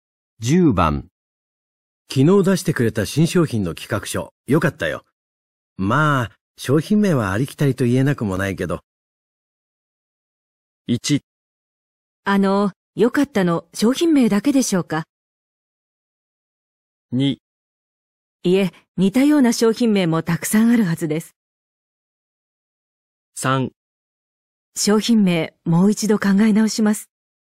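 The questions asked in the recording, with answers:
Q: 昨日出してくれた新商品の企画書、よかったよ。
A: 3: 商品名、もう一度考え直します。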